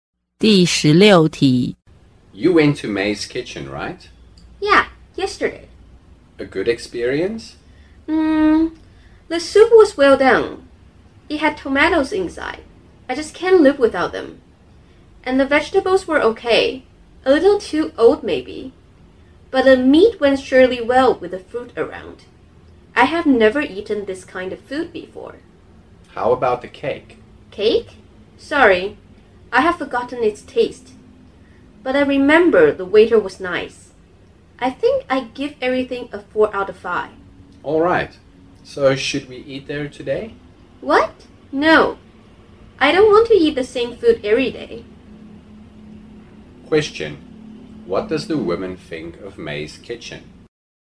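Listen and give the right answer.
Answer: It's quite good (4 out of 5)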